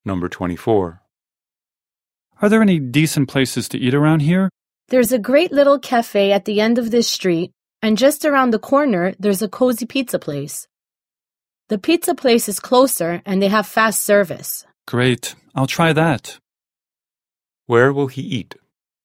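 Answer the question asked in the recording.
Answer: At the pizza place around the corner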